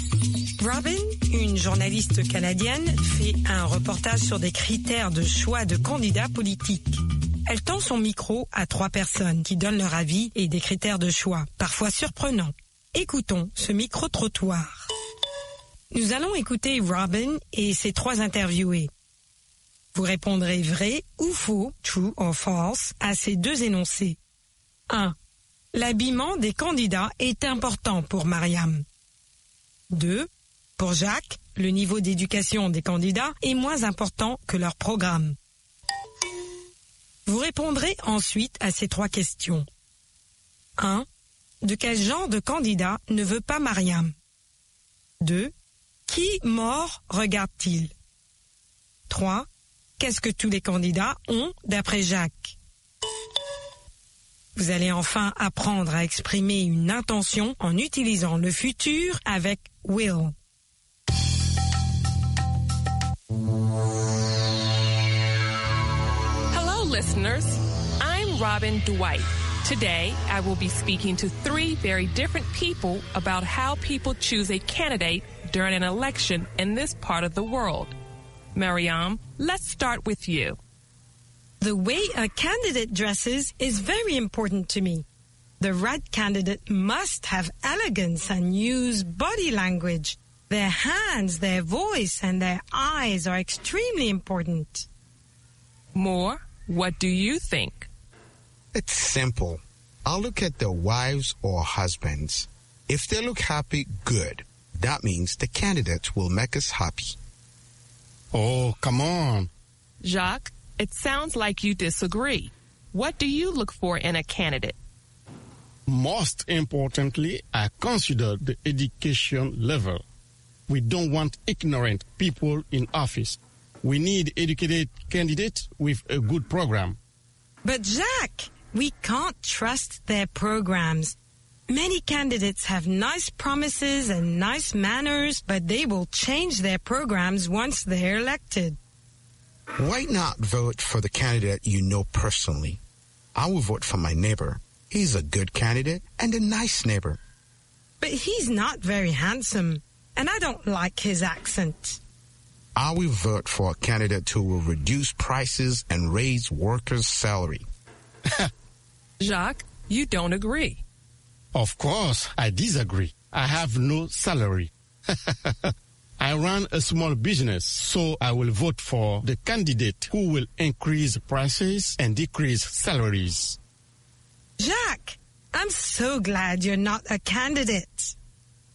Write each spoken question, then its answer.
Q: L'habillement des candidats est important pour Mariam.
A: L'énoncé 1 est vrai. L'habillement des candidats est important pour Mariam.

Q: Pour Jacques, le niveau d'éducation des candidats est moins important que leur programme.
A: L'énoncé 2 est faux.

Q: Qui mort regarde-t-il?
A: Les femmes des candidats et les maris des candidates.